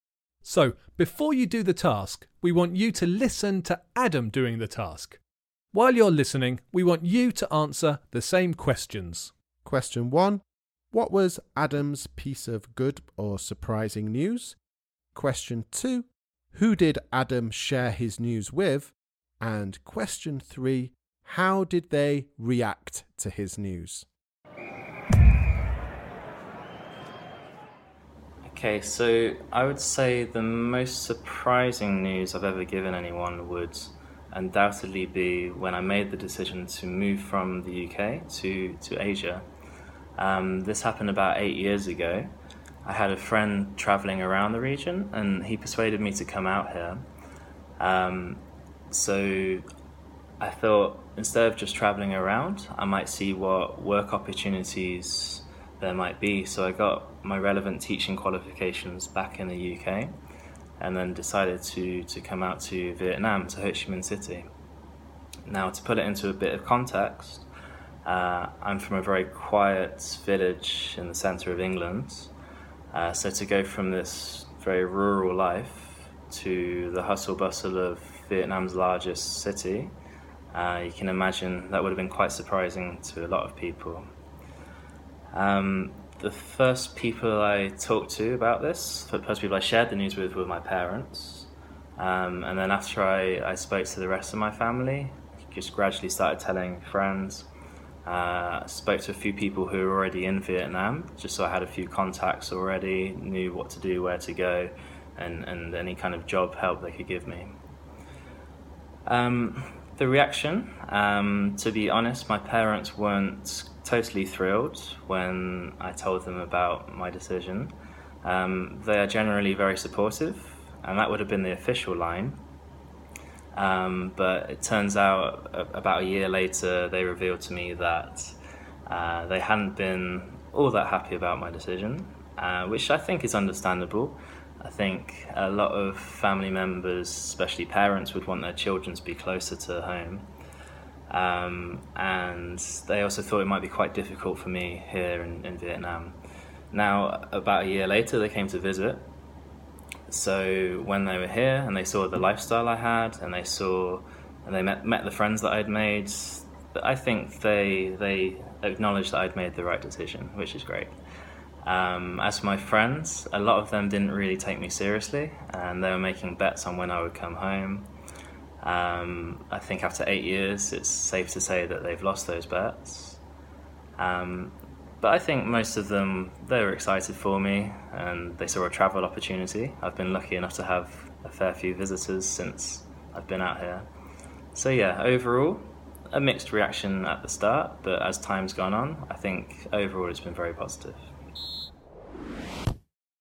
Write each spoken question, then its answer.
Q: Question 1. What was Adam's piece of good or surprising news?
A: Adam's news was that he was going to move from England to Vietnam.

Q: Question 2. Who did Adam share his news with?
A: Well, he told his parents and then the rest of his family and friends.

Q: And question 3. How did they react to his news?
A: This was the most difficult to answer, but his parents were happy for him on the outside, but a little bit worried in reality.